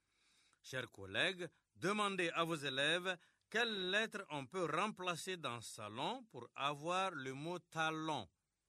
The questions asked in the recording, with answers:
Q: Chers collègues, demandez à vos élèves quelle lettre on peut remplacer dans salon pour avoir le mot talon.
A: Dans salon, on remplace S par T pour avoir talon.